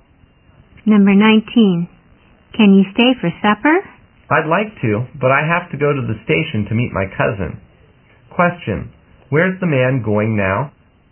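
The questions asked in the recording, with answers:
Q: Question, where's the man going now?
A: To the station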